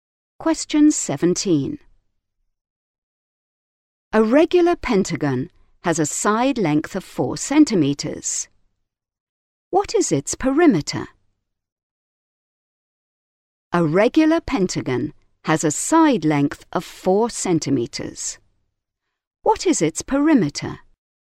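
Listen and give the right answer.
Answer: 20 centimetres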